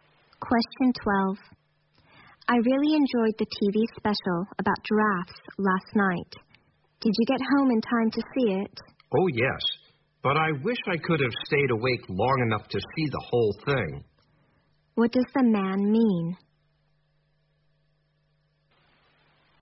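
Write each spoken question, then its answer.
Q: What does the man mean?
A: He fell asleep before the special ended, so he only saw part of it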